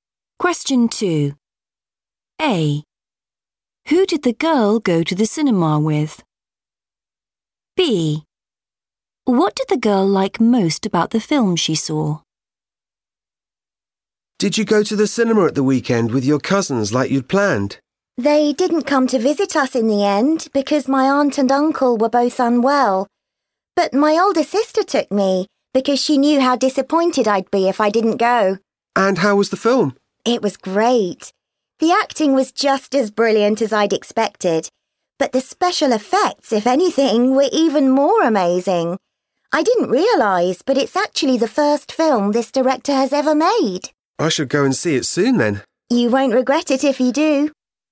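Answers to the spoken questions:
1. her older sister
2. the special effects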